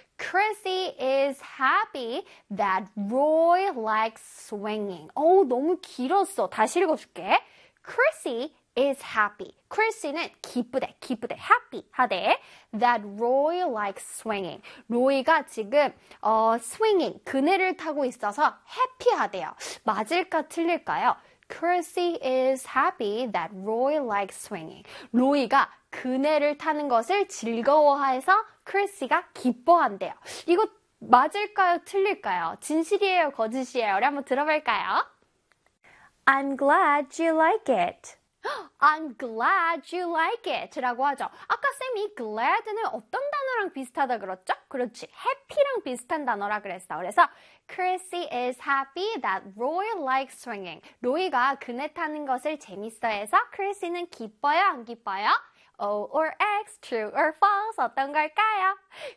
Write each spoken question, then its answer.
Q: Chrissy is happy that Roy likes swinging.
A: 그렇지요. 바로바로 O가 돼야 되겠죠?